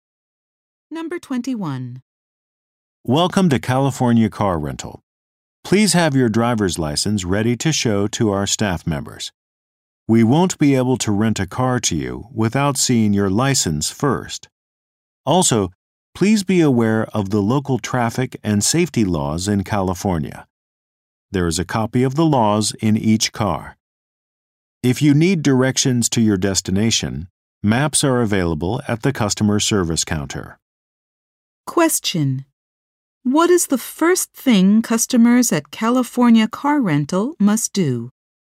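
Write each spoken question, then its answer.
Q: What is the first thing customers at California Car Rental must do?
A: Show their driver's license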